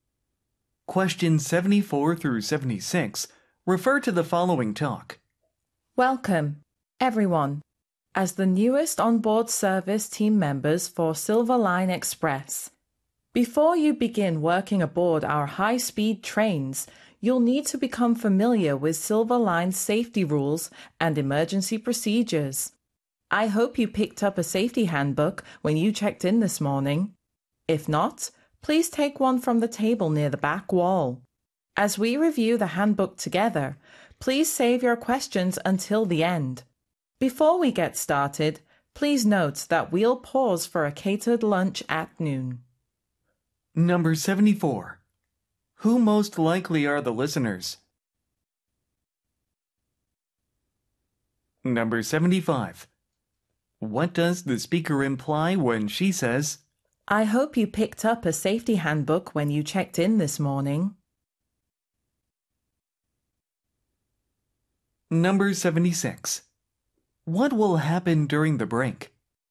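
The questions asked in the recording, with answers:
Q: Who most likely are the listeners?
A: New onboard service staff for a train company

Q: What will happen during the break?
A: A catered lunch will be served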